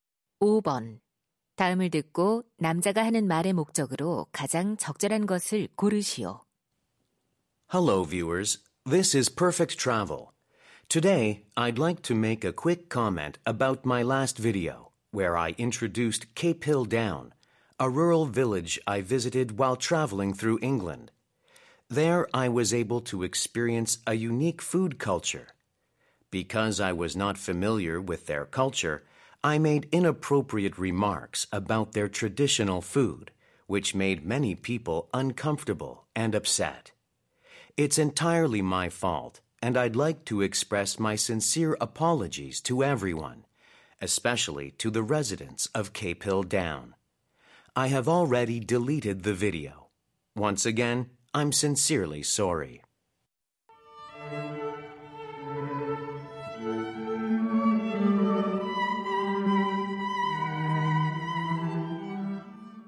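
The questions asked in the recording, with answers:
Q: 다음을 듣고 남자가 하는 말의 목적으로 가장 적절한 것을 고르시오.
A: 지난 영상의 부적절한 발언에 대해 사과하려고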